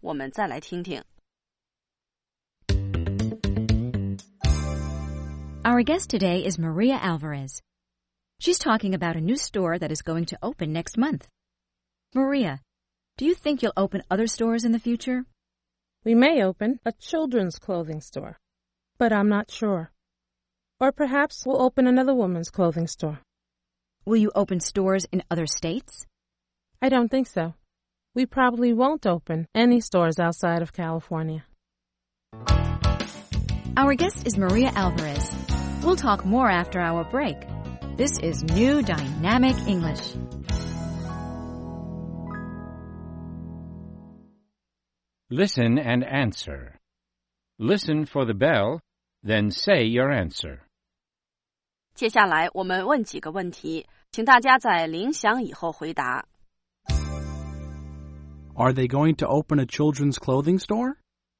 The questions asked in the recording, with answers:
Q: Are they going to open a children's clothing store?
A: They may open a children's clothing store, but they're not sure.